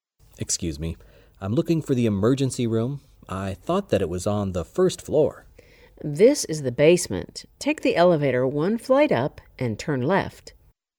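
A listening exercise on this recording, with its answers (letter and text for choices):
Where did the conversation most probably take place?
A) In a library.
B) In a hotel.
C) In a hospital.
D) In an elevator.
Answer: C) In a hospital.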